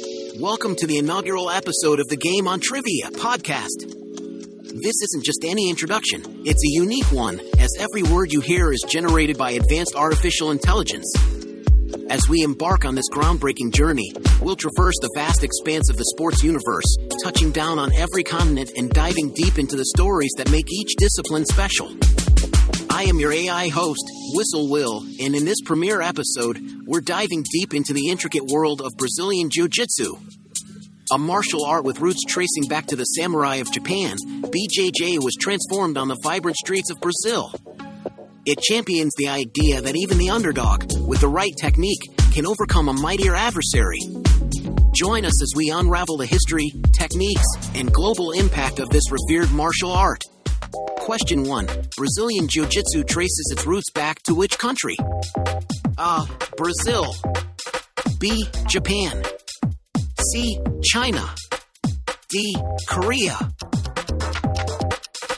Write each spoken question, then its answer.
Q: Brazilian Jiu Jitsu traces its roots back to which country?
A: The answer is B. Japan.